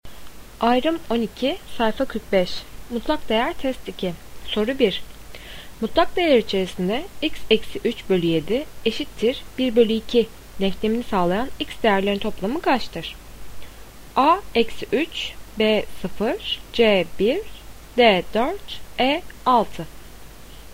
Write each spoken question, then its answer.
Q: Mutlak değer içerisinde x eksi 3 bölü 7 eşittir 1 bölü 2 denklemini sağlayan x değerlerin toplamı kaçtır?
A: Doğru cevap E 6.